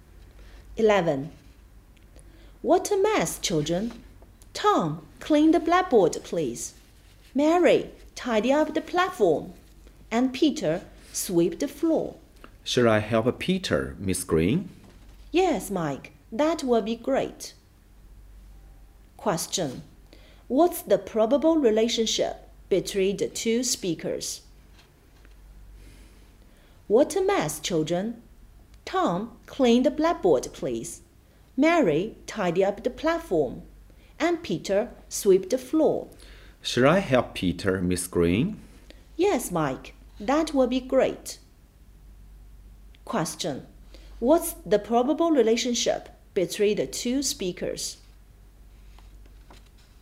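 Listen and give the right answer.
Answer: Teacher and student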